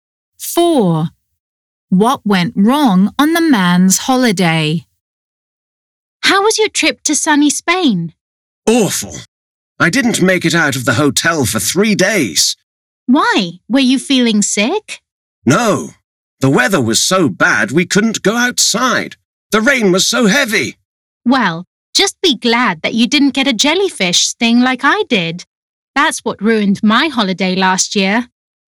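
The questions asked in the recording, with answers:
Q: What went wrong on the man's holiday?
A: Heavy rain kept him in the hotel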